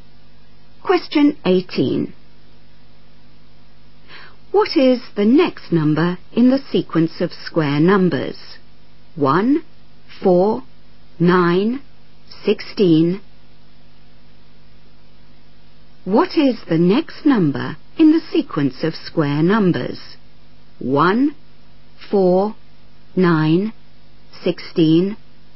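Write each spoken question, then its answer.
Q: What is the next number in the sequence of square numbers?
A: 25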